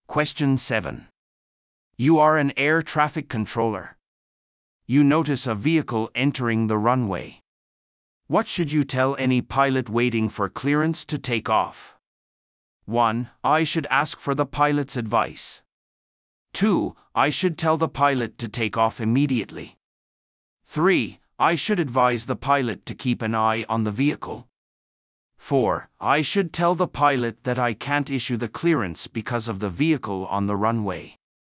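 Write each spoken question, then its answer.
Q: What should you tell any pilot waiting for clearance to take off?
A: 4: I should tell the pilot that I can't issue the clearance because of the vehicle on the runway.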